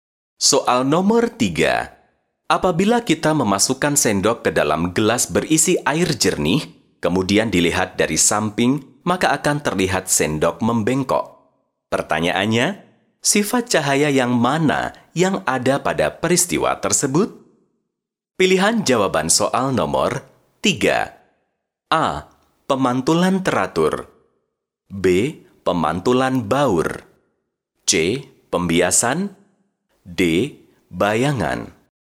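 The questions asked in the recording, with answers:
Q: Pertanyaannya, sifat cahaya yang mana yang ada pada peristiwa tersebut?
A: C: Pembiasan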